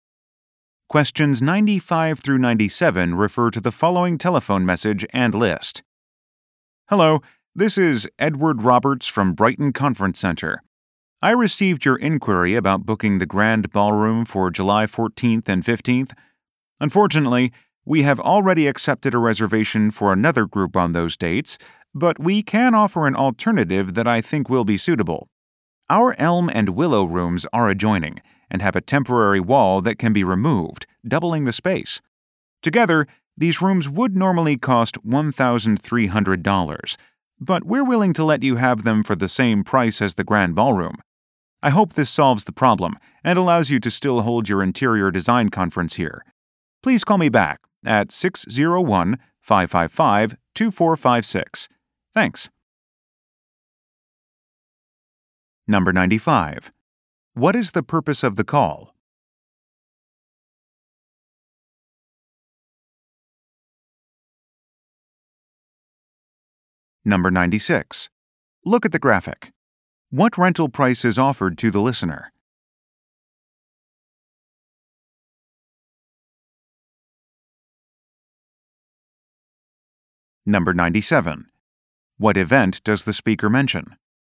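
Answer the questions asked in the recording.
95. To offer an alternative to the unavailable Grand Ballroom
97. An interior design conference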